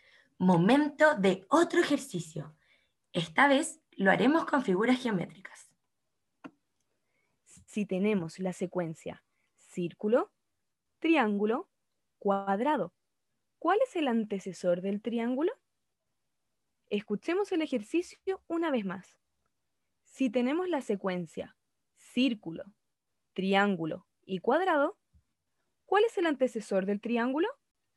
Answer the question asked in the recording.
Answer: el antecesor de triángulo es círculo